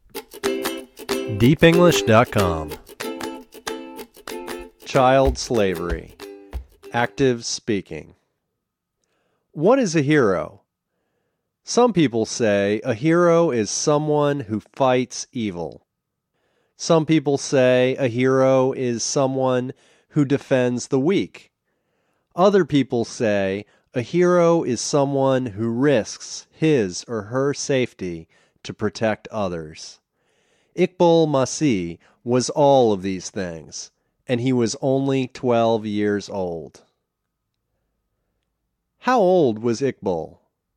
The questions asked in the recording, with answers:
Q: How old was Iqbal?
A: He was 12 years old.